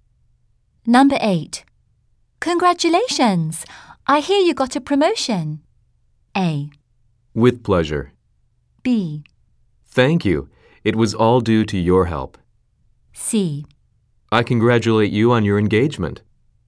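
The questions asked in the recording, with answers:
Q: Congratulations! I hear you got a promotion.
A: B: Thank you.It was all due to your help.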